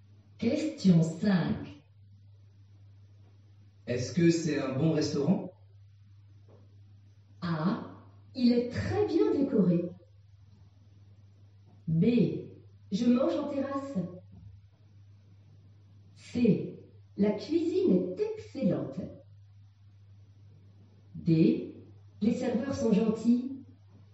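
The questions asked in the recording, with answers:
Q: Est-ce que c'est un bon restaurant?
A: C: La cuisine est excellente.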